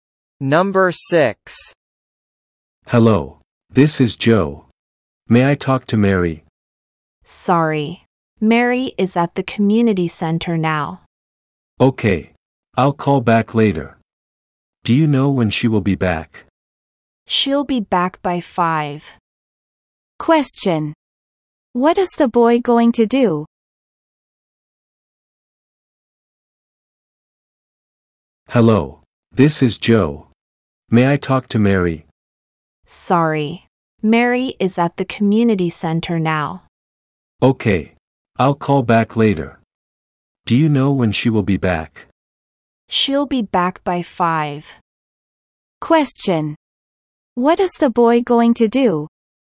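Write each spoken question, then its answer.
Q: What is the boy going to do?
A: He will call Mary back later.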